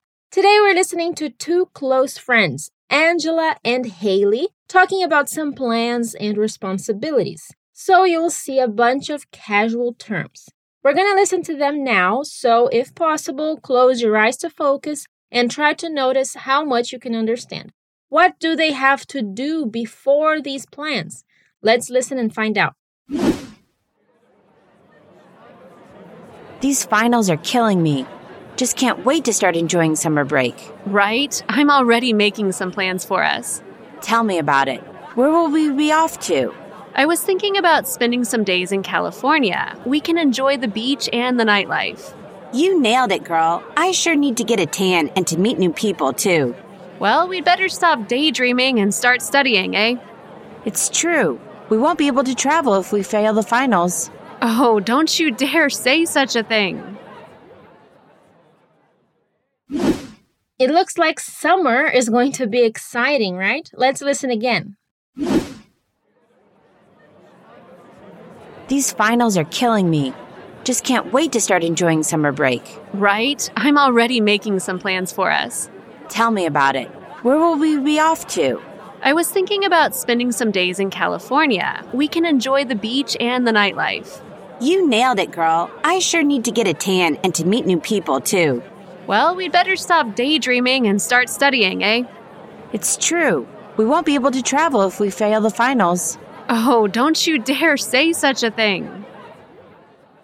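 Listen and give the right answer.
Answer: Study and pass their finals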